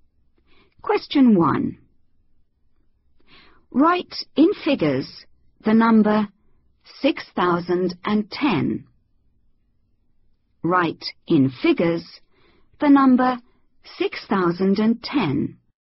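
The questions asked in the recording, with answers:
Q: Write in figures the number 6010.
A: 6010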